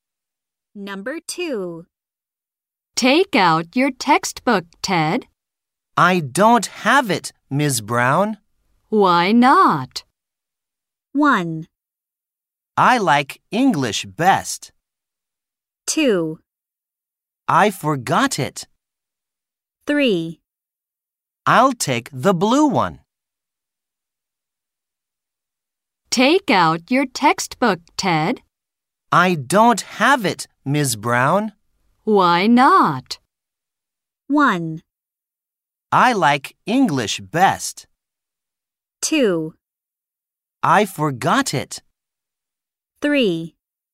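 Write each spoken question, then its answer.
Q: Why not?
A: 2: I forgot it.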